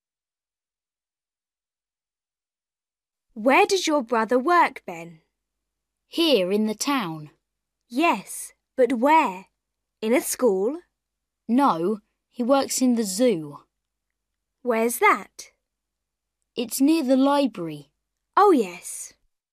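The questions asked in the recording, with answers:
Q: Where does Ben's brother work?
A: in the zoo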